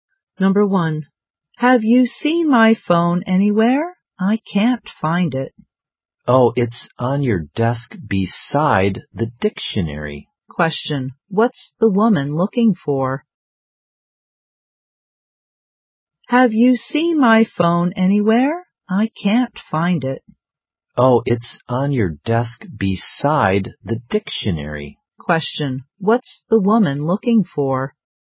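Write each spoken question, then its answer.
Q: what's the woman looking for?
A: Her phone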